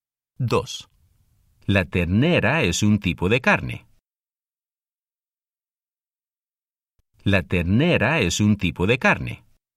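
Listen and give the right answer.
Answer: sí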